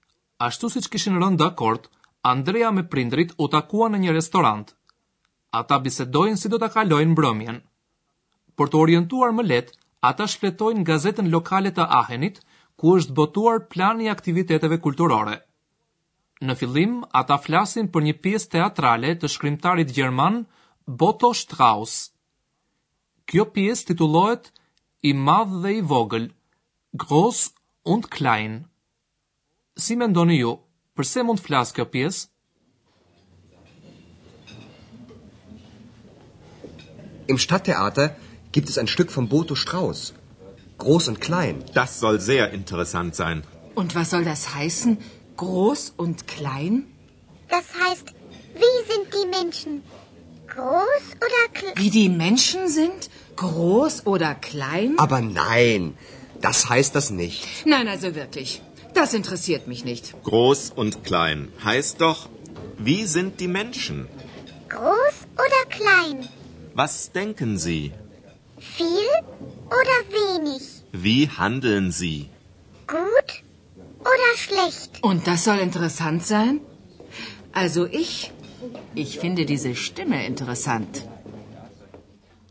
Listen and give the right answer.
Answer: Zoti Shefer mendon se titulli i pjesës i vogël dhe i madh ka parasysh karakterin e njerëzve.